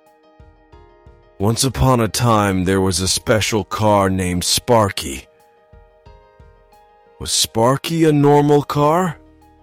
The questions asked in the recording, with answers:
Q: Was Sparky a normal car?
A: No, he wasn't. He was a special car.